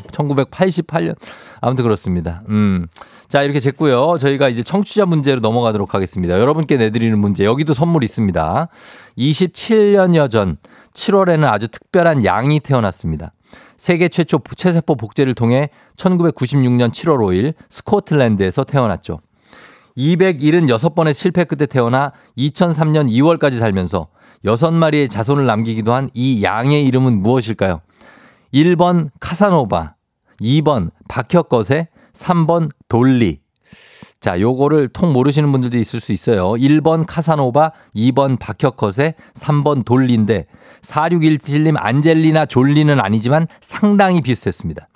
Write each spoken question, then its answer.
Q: 276번의 실패 끝에 태어나 2003년 2월까지 살면서 6마리의 자손을 남기기도 한 이 양의 이름은 무엇일까요?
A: 정답 바로 돌리입니다.